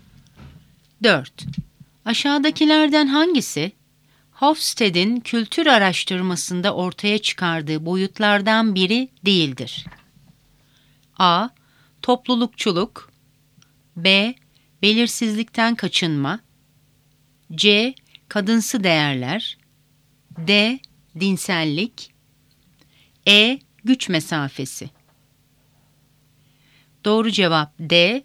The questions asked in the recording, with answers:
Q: Aşağıdakilerden hangisi, Hofstede'in kültür araştırmasında ortaya çıkardığı boyutlardan biri değildir?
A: Doğru cevap D. Dinsellik.